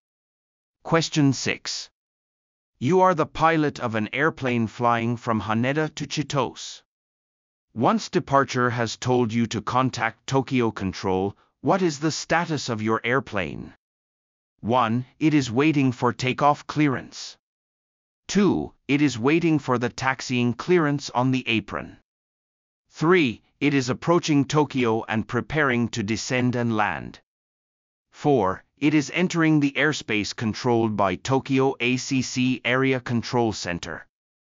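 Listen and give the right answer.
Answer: 4: It is entering the airspace controlled by Tokyo ACC Area Control Center.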